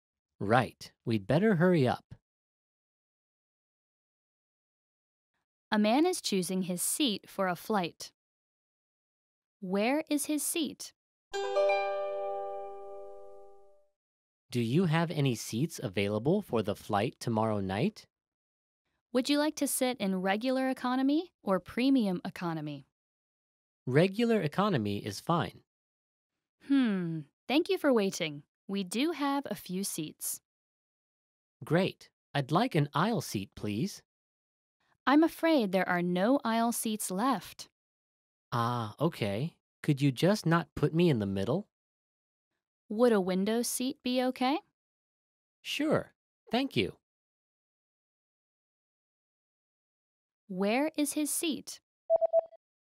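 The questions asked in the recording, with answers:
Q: Where is his seat?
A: A window seat in regular economy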